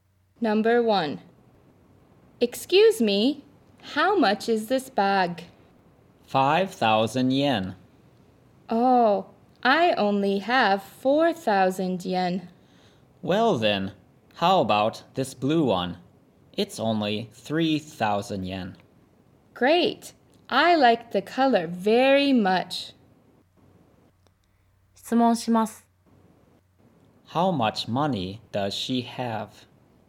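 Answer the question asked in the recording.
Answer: 4,000 yen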